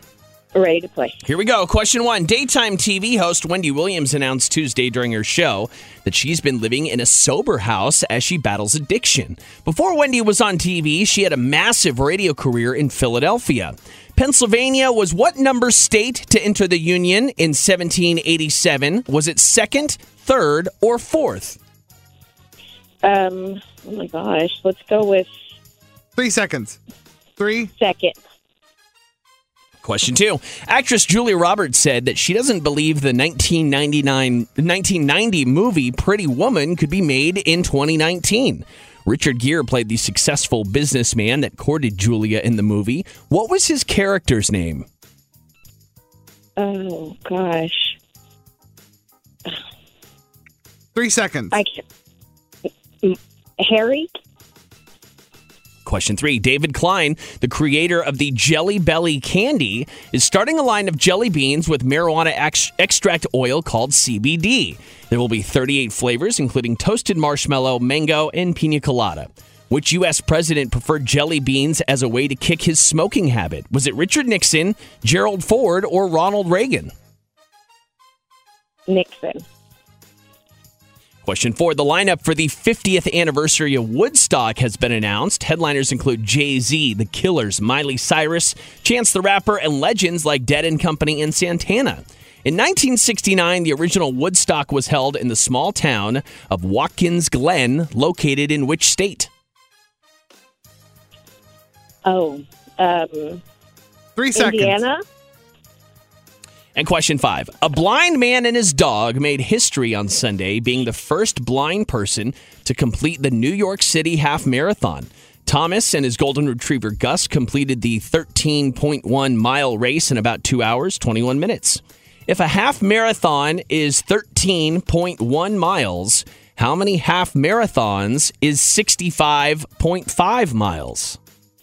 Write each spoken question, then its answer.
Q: If a half marathon is 13.1 miles, how many half marathons is 65.5 miles?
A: Five is correct!